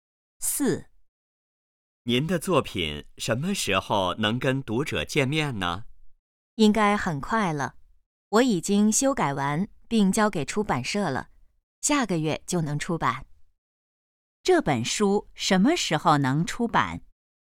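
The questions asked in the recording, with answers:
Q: 这本书什么时候能出版?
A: 下个月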